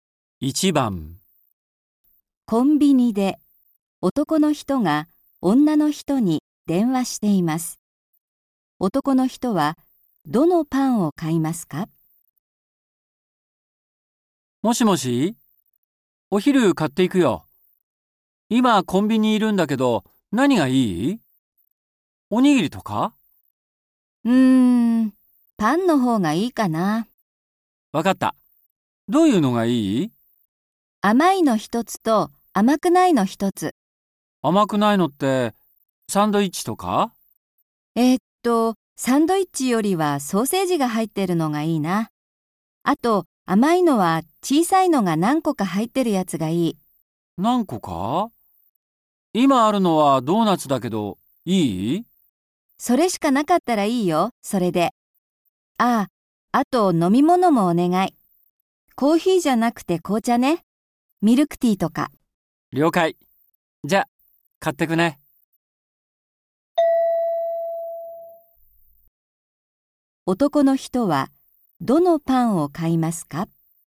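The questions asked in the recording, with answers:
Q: 男の人はどのパンを買いますか?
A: ソーセージが入ったパンと、小さいドーナツが何個か入ったもの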